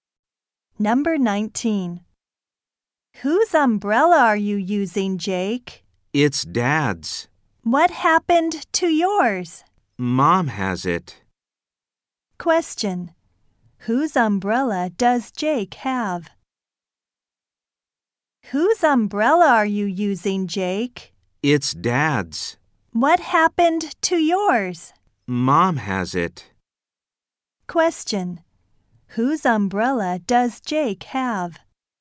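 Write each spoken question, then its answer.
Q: Whose umbrella does Jake have?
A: His dad's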